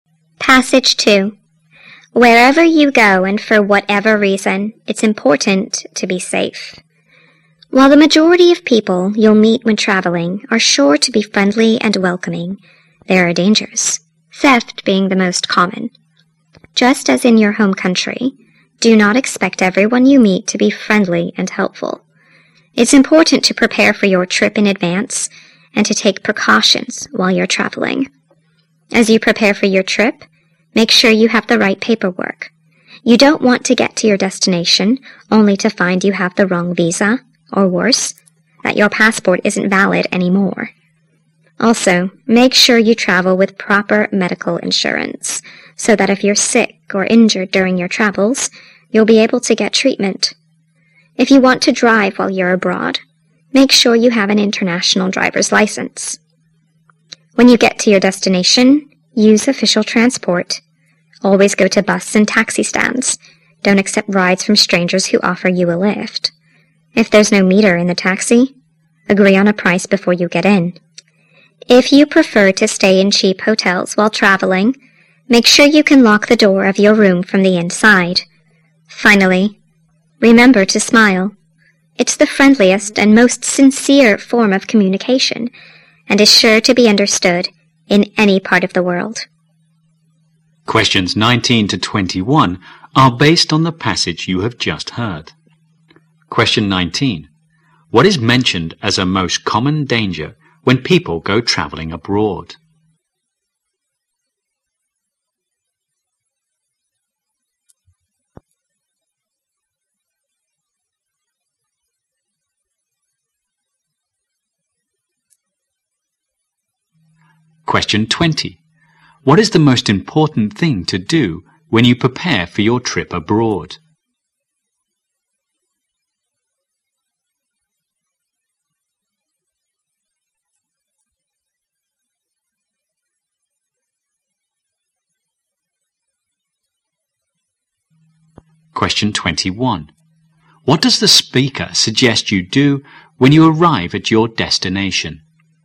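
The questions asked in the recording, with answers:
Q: What is mentioned as a most common danger when people go traveling abroad?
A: Theft.

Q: What is the most important thing to do when you prepare for your trip abroad?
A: Make sure you have the right paperwork.

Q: What does the speaker suggest you do when you arrive at your destination?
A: Use official transport.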